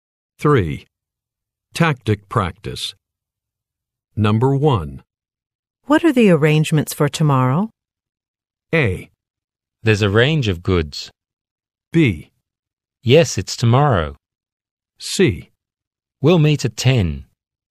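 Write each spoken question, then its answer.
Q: What are the arrangements for tomorrow?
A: C: We'll meet at 10.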